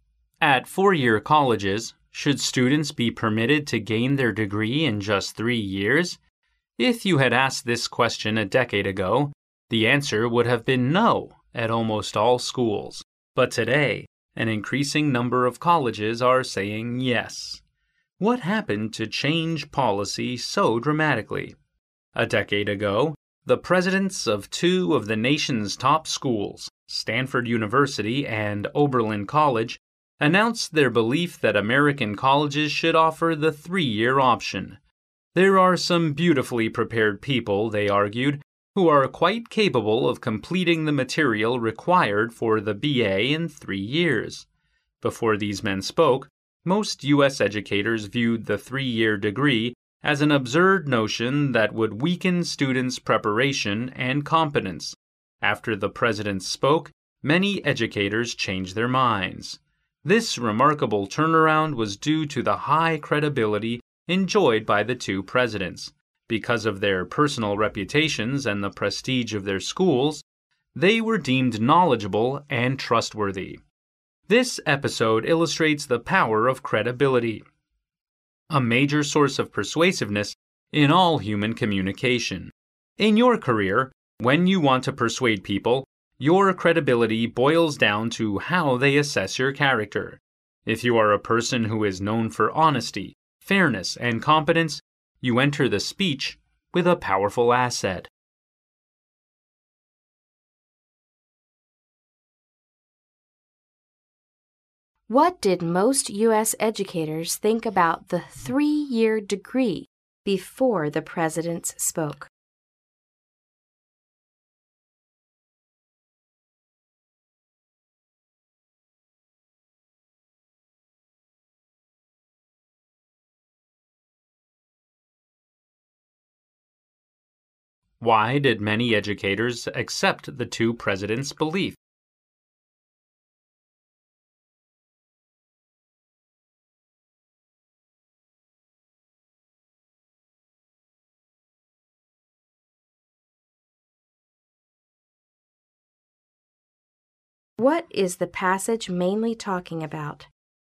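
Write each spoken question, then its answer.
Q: What did most U.S. educators think about the three-year degree before the presidents spoke?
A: They viewed it as an absurd notion that would weaken students' preparation and competence.

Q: Why did many educators accept the two presidents' belief?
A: Because of the presidents' high credibility, from their personal reputations and the prestige of their schools.

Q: What is the passage mainly talking about?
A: The power of credibility in persuasion.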